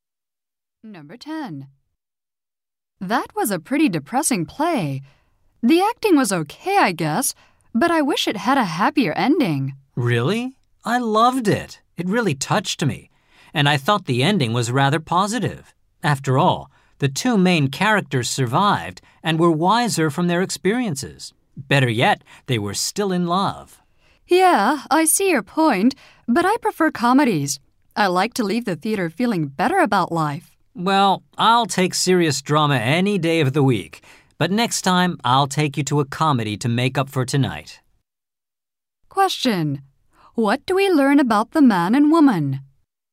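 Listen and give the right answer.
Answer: They have different tastes: one prefers comedies, the other serious drama.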